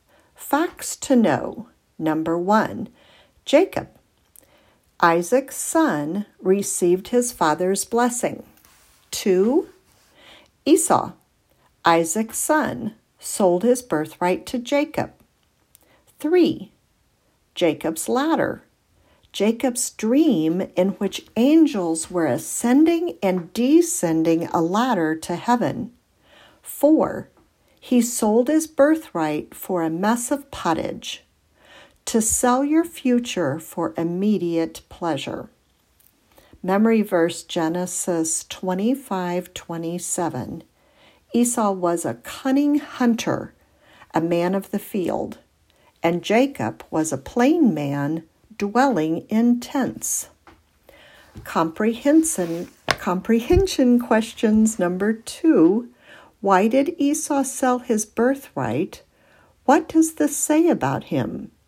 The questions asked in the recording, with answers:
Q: Why did Esau sell his birthright? What does this say about him?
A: Esau sold his future inheritance for something to eat immediately. He lived for the present rather than planning for the future.